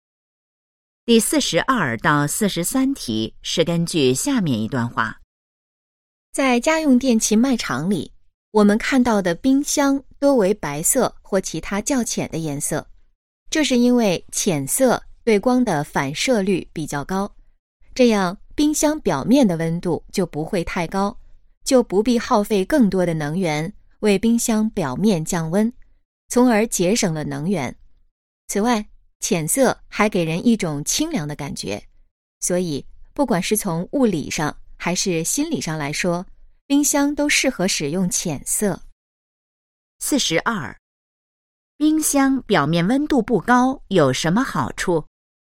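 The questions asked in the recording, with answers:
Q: 冰箱表面温度不高有什么好处?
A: 节省能源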